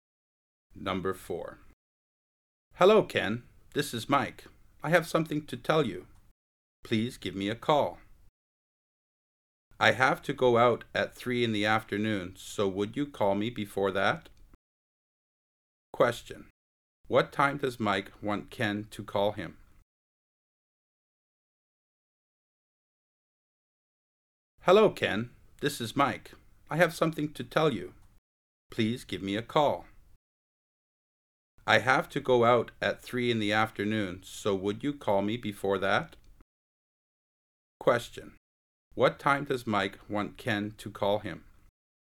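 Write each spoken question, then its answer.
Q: What time does Mike want Ken to call him?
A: Before 3 in the afternoon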